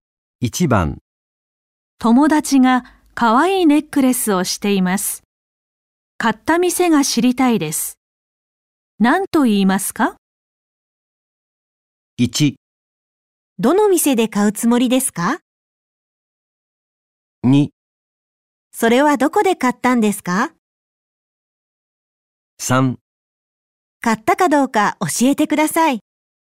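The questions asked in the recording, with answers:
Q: 何と言いますか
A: 2: それはどこで買ったんですか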